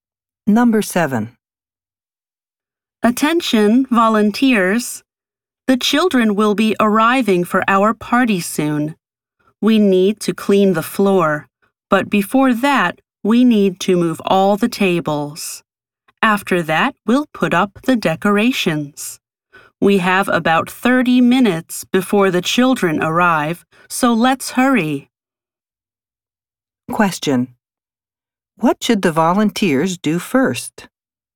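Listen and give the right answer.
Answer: Move all the tables.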